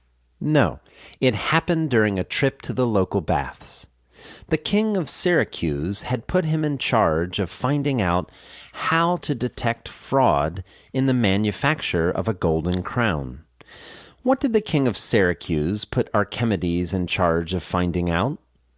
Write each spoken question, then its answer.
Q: What did the king of Syracuse put Archimedes in charge of finding out?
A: He put him in charge of finding out how to detect fraud in the manufacture of a golden crown.